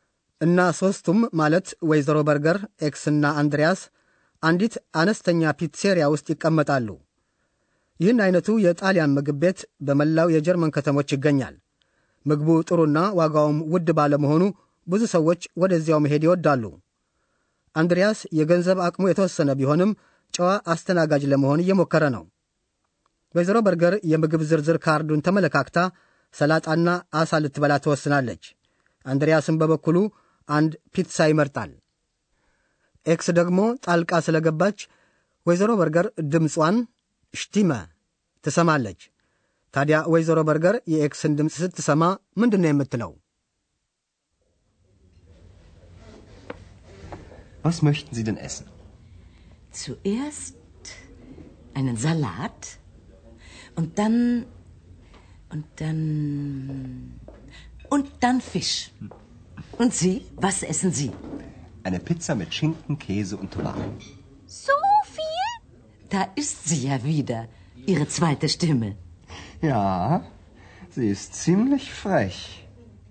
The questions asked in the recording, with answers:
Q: ታዲያ ወይዘሮ በርገር የኤክስን ድምፅ ስትሰማ ምንድን ነው የምትለው?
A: ወይዘሮ በርገር እንደ መደሰት እያላት ስለ አንድሪያስ ሁለተኛ ድምፅ ነው የተናገረችው።